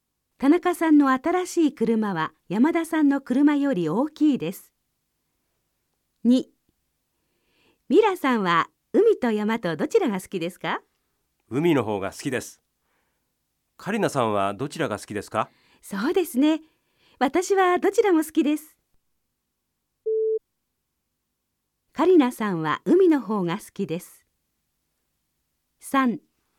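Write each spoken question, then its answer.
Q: カリナさんは海の方が好きです。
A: ×(カリナさんはどちらも好き)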